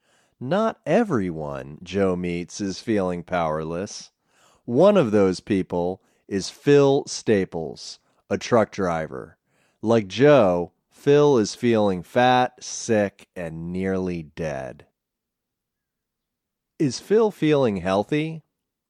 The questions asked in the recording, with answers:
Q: Is Phil feeling healthy?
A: No, Phil isn't feeling healthy.